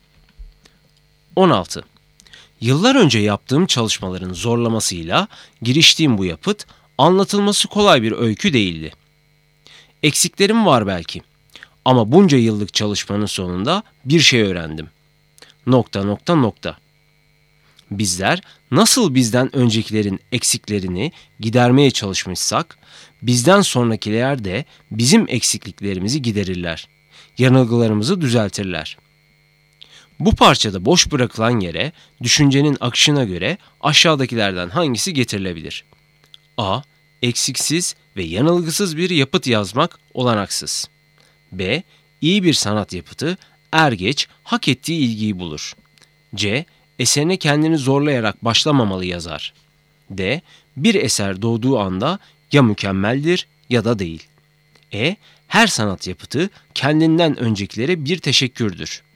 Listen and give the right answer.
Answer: Doğru cevap A. Eksiksiz ve yanılgısız bir yapıt yazmak olanaksız.